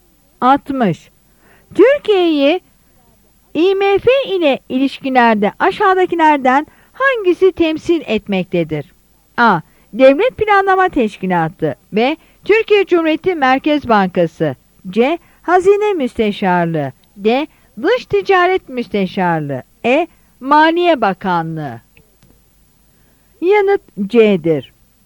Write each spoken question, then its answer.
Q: Türkiye'yi IMF ile ilişkilerde aşağıdakilerden hangisi temsil etmektedir?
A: Yanıt C'dir.